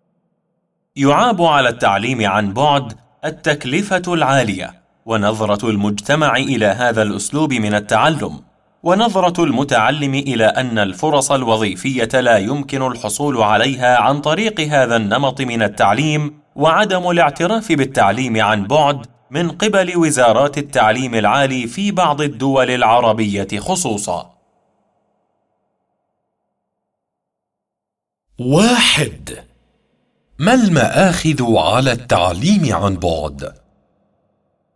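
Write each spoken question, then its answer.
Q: ما المآخذ على التعليم عن بعد؟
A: التكلفة العالية، ونظرة المجتمع السلبية إليه، واعتقاد المتعلم أنه لا يوفر فرصاً وظيفية، وعدم اعتراف وزارات التعليم العالي به في بعض الدول العربية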